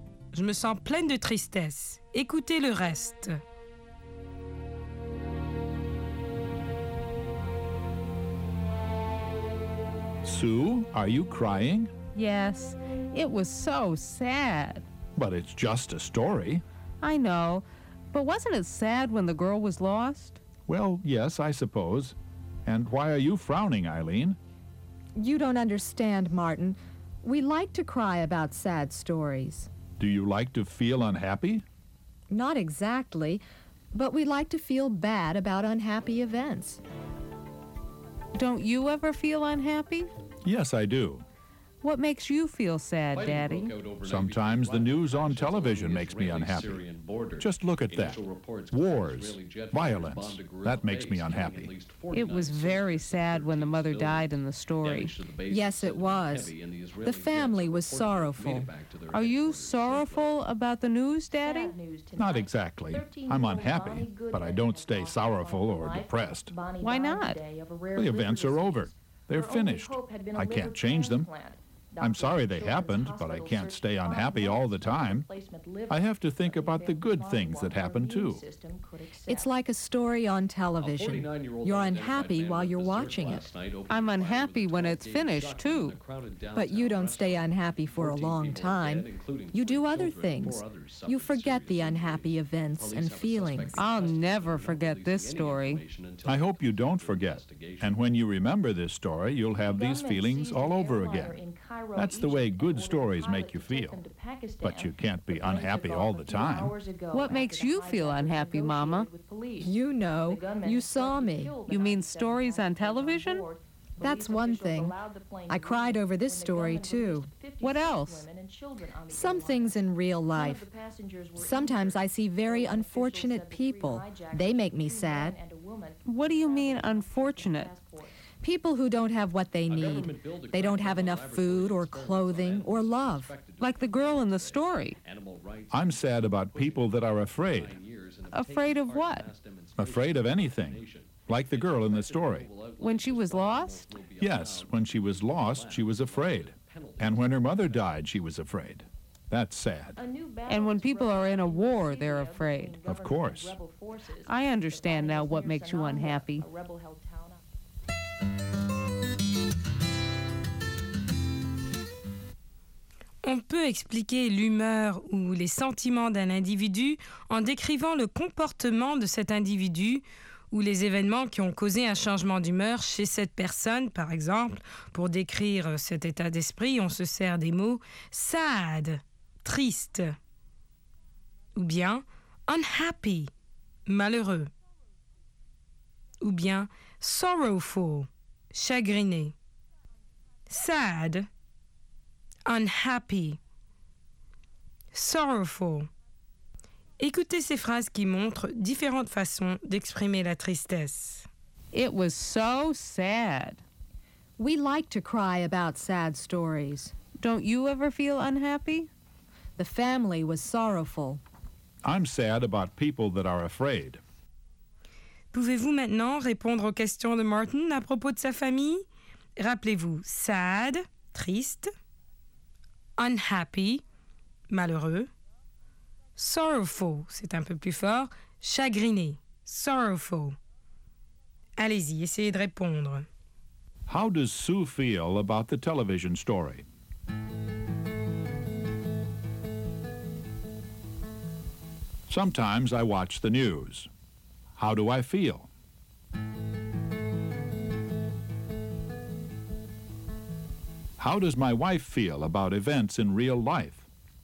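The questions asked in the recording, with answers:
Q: How does Sue feel about the television story?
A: She feels sad; it made her cry.

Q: How do I feel?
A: Unhappy, but he doesn't stay sorrowful or depressed.

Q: How does my wife feel about events in real life?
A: Unfortunate people and people who are afraid make her sad.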